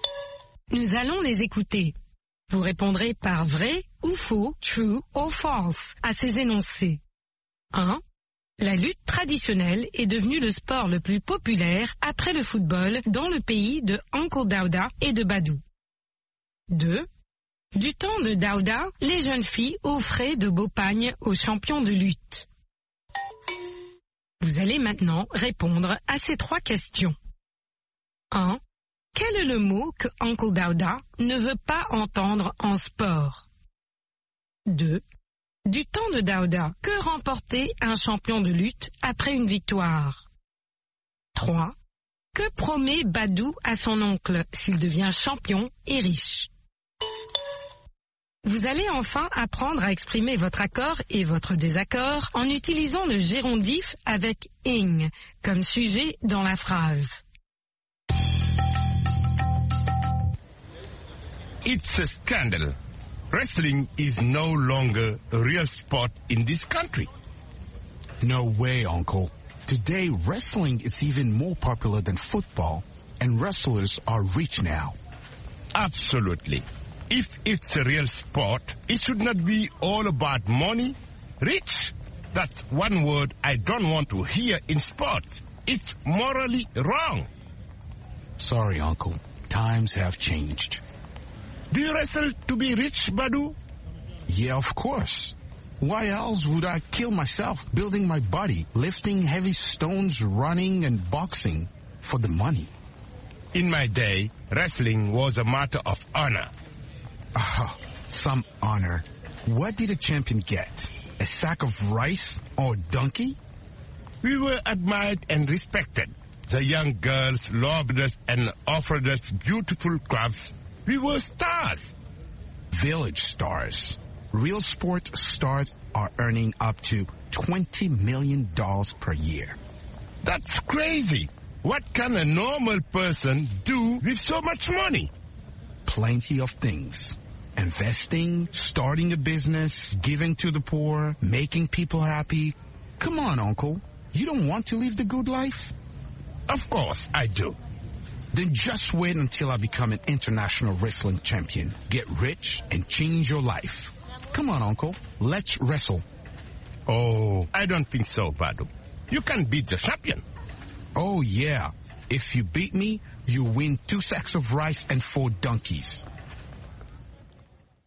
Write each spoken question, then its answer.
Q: La lutte traditionnelle est devenue le sport le plus populaire après le football dans le pays de Uncle Daouda et de Badou.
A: L'énoncé 1 est faux.

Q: Du temps de Daouda, les jeunes filles offraient de beaux pagnes aux champions de lutte.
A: L'énoncé 2 est vrai.

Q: Quel est le mot que Uncle Daouda ne veut pas entendre en sport?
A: Riche.

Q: Du temps de Daouda, que remportait un champion de lutte après une victoire?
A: Un sac de riz ou un âne?

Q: Que promet Badou à son oncle s'il devient champion et riche?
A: De changer la vie de son oncle.